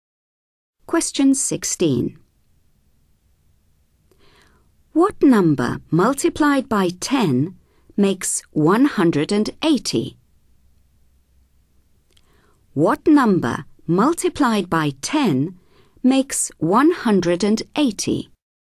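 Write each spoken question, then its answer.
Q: What number multiplied by 10 makes 180?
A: 18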